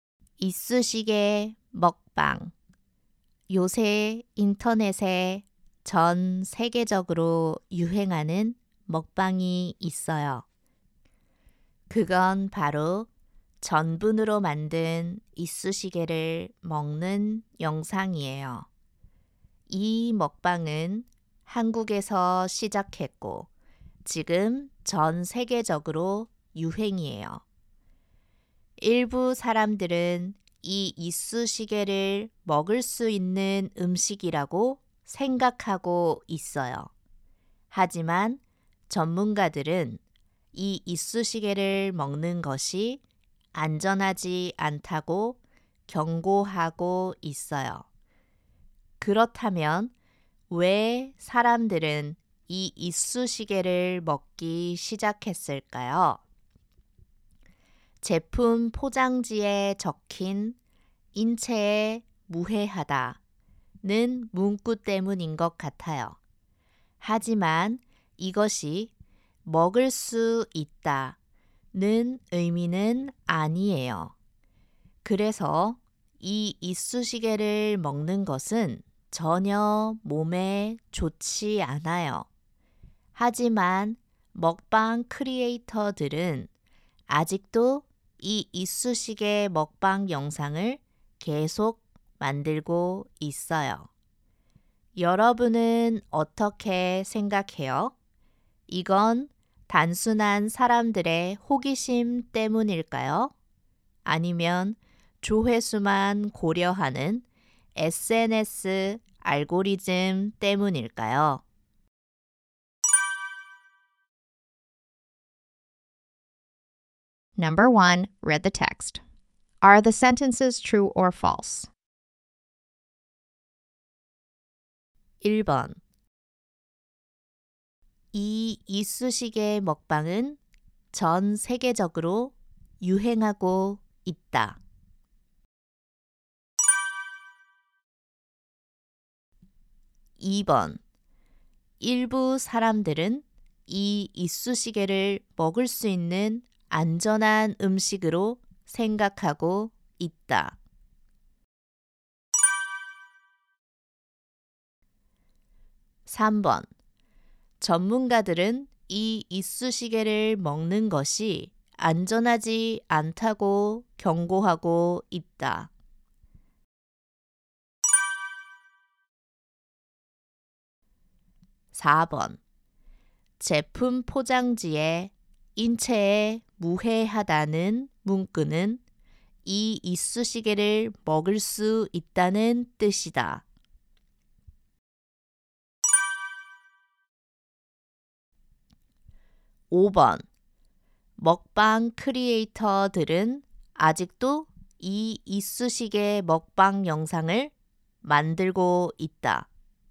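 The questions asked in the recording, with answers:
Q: 제품 포장지에 인체에 무해하다는 문구는 이 이쑤시개를 먹을 수 있다는 뜻이다.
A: 거짓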